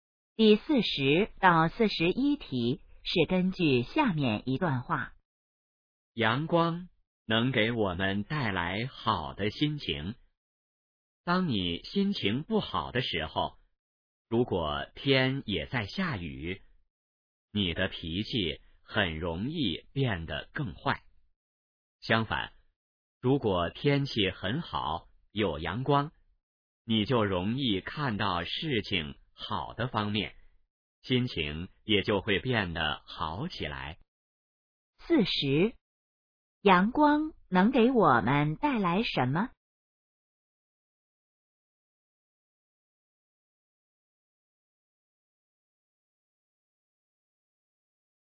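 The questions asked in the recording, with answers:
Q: 阳光能给我们带来什么?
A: 好的心情

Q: 这段话主要谈什么?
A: 阳光对心情的影响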